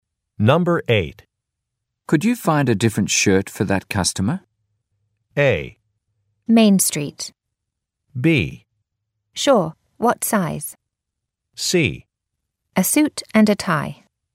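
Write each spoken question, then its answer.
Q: Could you find a different shirt for that customer?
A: B: Sure, what size?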